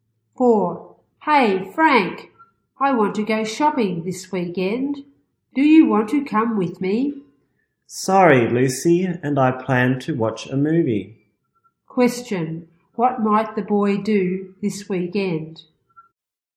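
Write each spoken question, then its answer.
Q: Question.What might the boy do this weekend?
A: Watch a movie.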